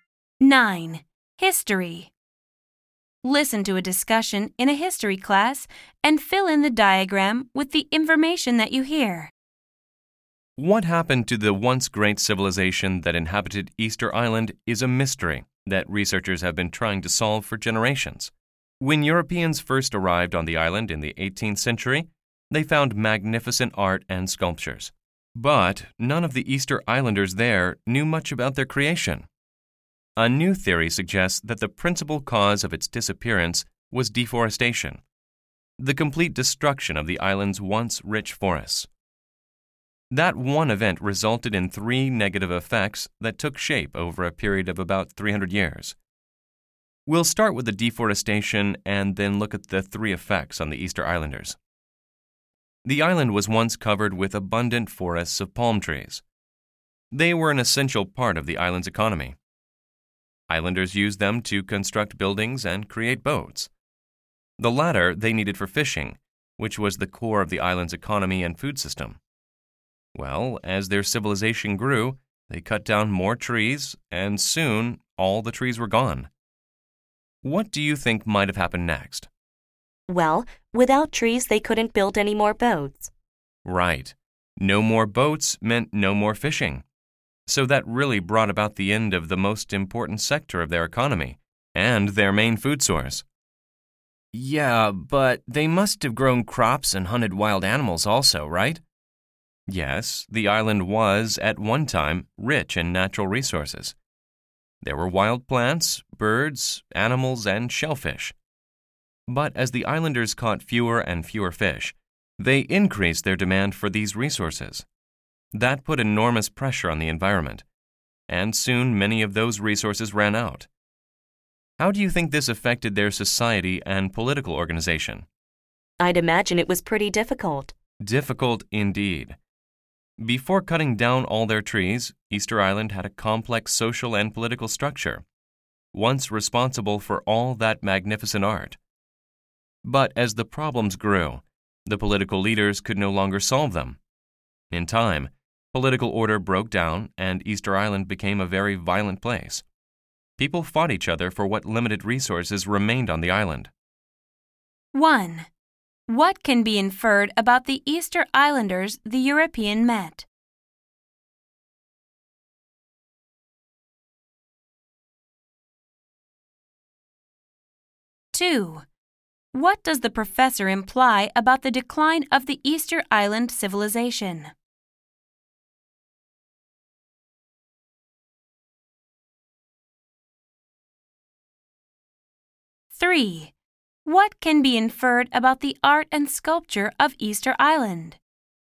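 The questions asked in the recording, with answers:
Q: What can be inferred about the Easter Islanders the European met?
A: They knew little about who created the island's art and sculptures

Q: What does the professor imply about the decline of the Easter Island civilization?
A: It was mainly caused by deforestation, which led to the loss of fishing, depleted resources and political collapse over about 300 years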